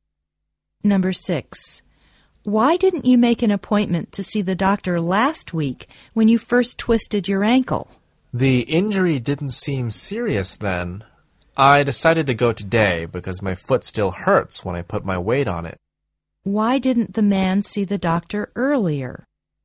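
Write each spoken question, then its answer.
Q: Why didn't the man see the doctor earlier?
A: The injury didn't seem serious then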